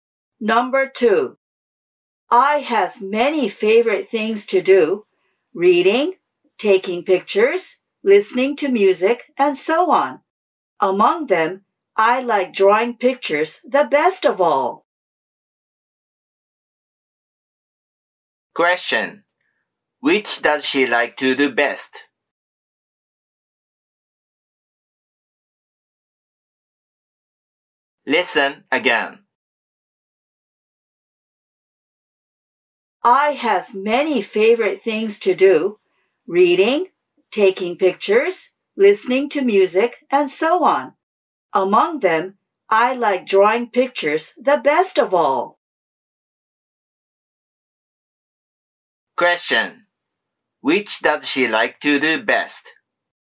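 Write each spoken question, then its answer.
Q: Which does she like to do best?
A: Drawing pictures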